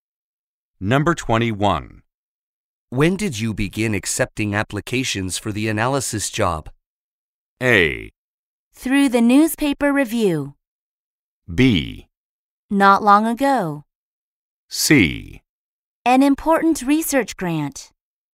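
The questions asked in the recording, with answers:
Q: When did you begin accepting applications for the analysis job?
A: B: Not long ago.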